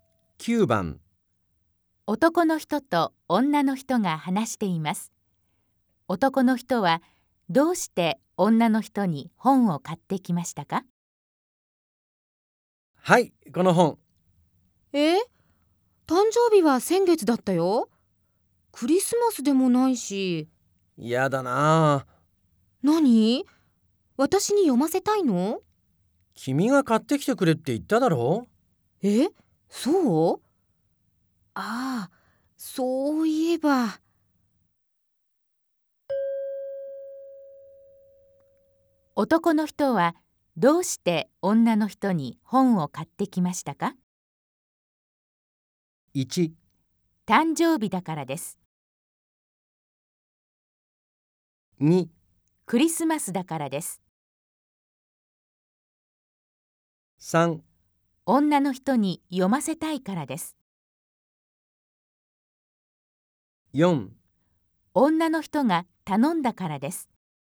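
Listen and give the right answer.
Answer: 4: 女の人が頼んだからです。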